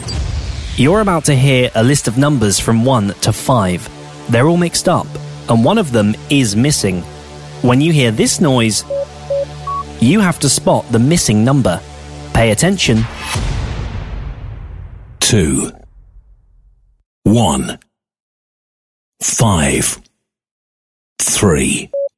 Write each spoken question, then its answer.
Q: When you hear this noise, you have to spot the missing number.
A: 4 is the answer.